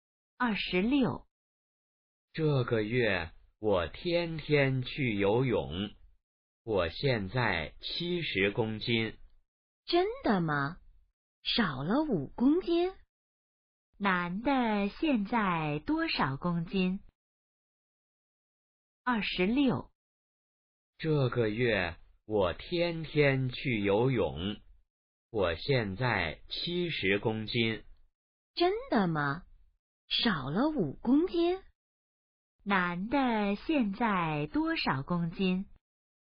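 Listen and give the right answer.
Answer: 70公斤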